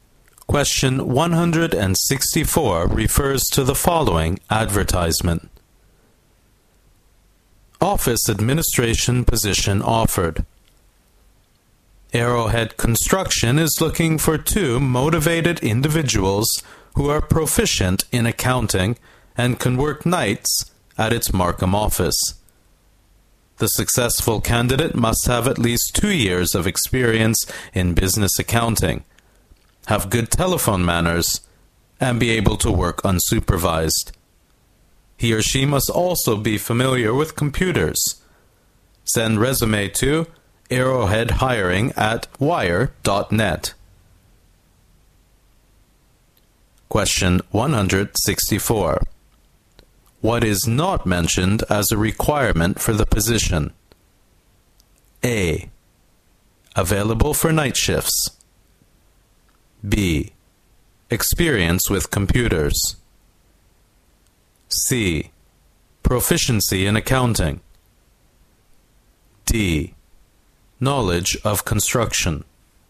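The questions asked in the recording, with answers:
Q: What is not mentioned as a requirement for the position?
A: D: Knowledge of construction.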